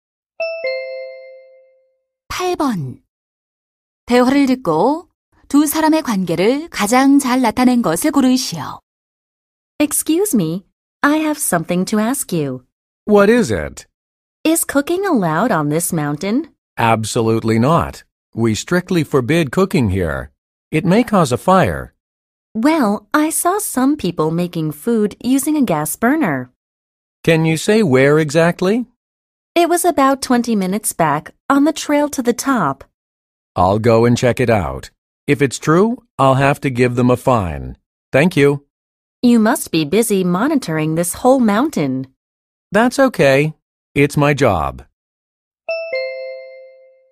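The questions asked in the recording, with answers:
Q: 대화를 듣고 두 사람의 관계를 가장 잘 나타낸 것을 고르시오.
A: 등산객 - 산림 관리원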